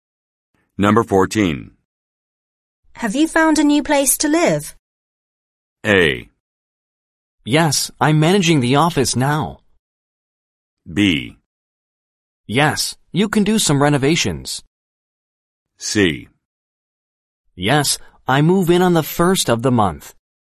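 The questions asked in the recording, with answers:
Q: Have you found a new place to live?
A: C: Yes, I move in on the first of the month.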